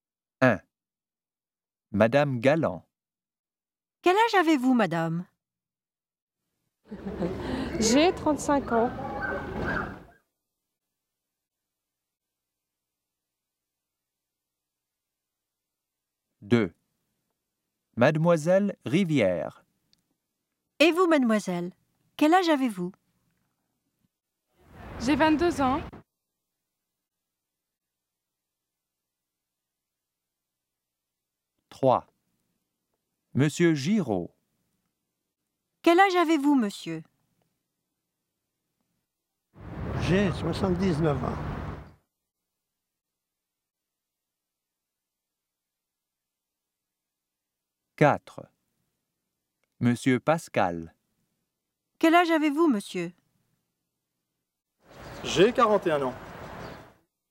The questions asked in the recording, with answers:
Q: Quel âge avez-vous, madame?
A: Madame Galland, 35.

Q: Et vous, mademoiselle, quel âge avez-vous?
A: Mademoiselle Rivière, 22.

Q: Quel âge avez-vous, monsieur?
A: Monsieur Giraud, 79.

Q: Quel âge avez-vous, monsieur?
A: Monsieur Pascal, 41.